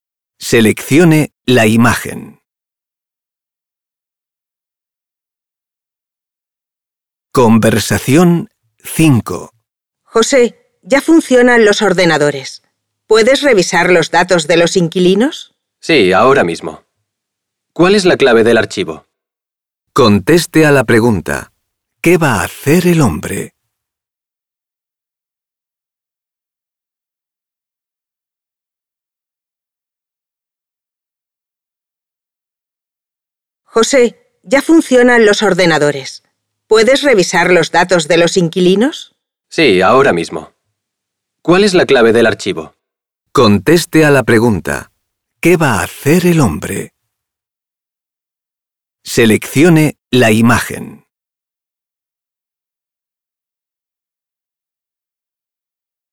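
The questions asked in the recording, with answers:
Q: ¿Qué va a hacer el hombre?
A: Revisar los datos de los inquilinos en el ordenador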